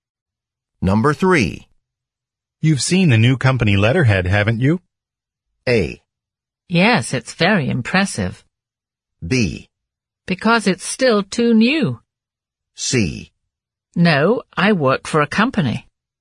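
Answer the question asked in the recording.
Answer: A: Yes, it's very impressive.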